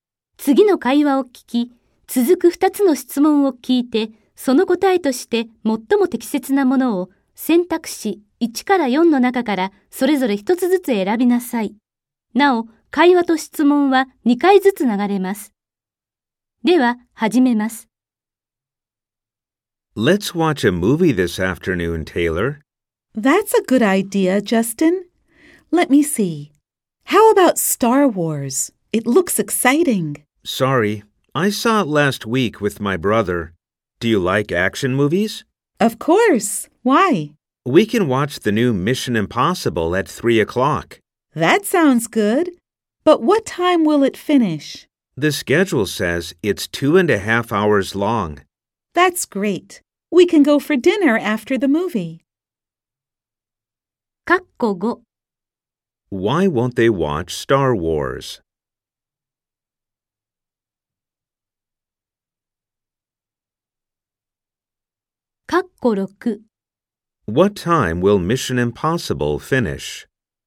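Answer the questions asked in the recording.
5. Because one of them already saw it last week with his brother.
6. At 5:30.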